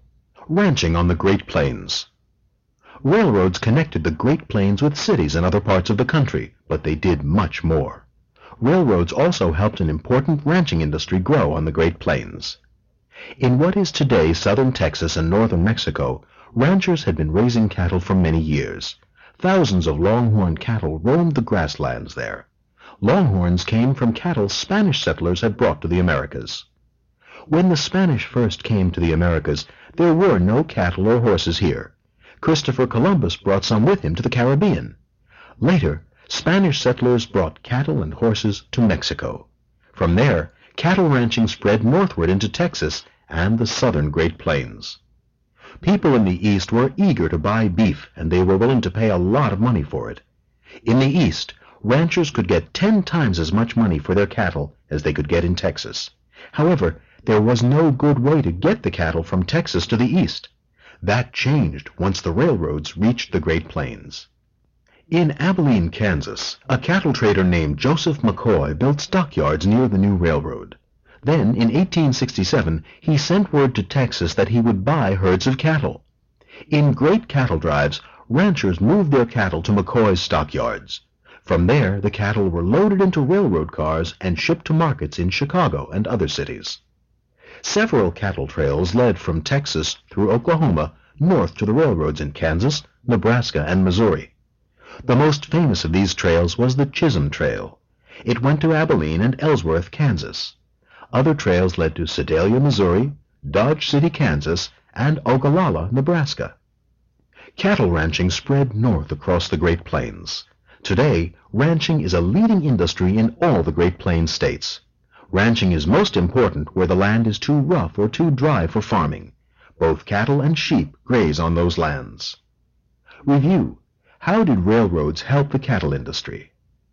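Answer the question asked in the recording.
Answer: They let ranchers ship cattle from stockyards on the Great Plains to markets in Chicago and other eastern cities, where cattle sold for much more.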